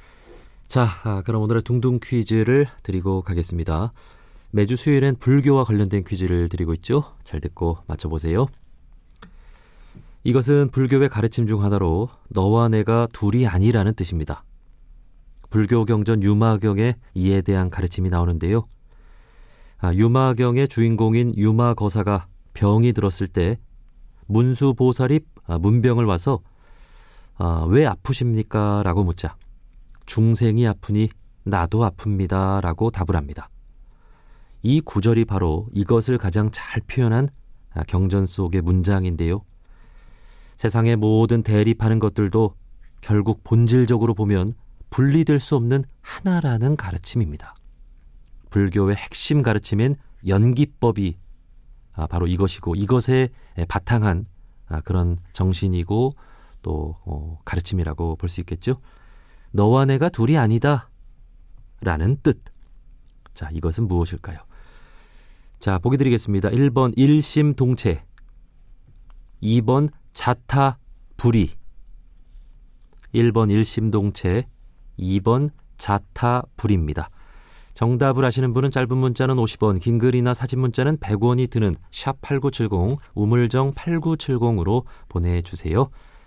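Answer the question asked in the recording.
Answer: 2: 자타불이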